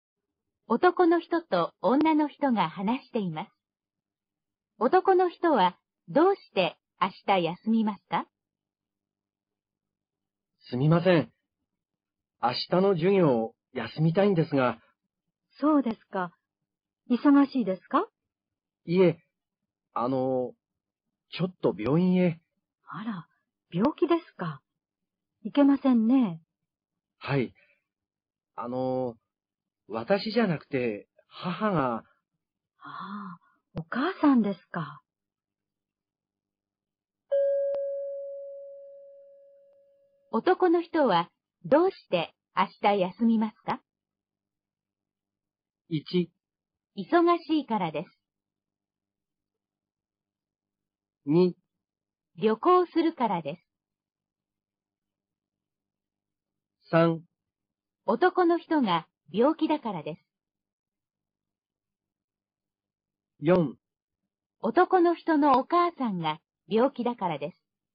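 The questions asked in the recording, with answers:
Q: 男の人は、どうして明日休みますか?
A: 4: 男の人のお母さんが病気だからです。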